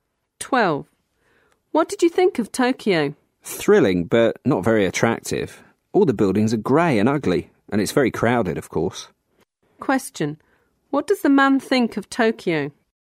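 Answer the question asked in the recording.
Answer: Thrilling, but not very attractive: grey, ugly and crowded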